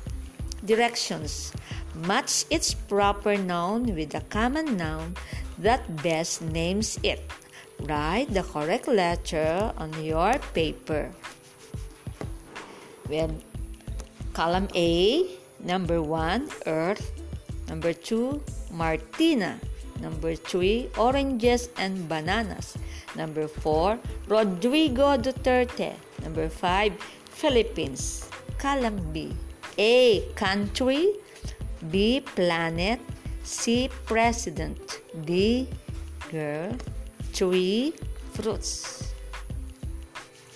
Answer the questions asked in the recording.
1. Number 1, the answer is B.
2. Number 2, letter G.
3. Number 3, letter E.
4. Number 4, letter C.
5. And number 5, letter A.